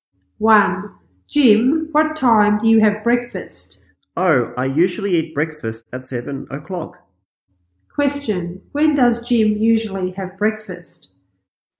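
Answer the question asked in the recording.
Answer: At 7 o'clock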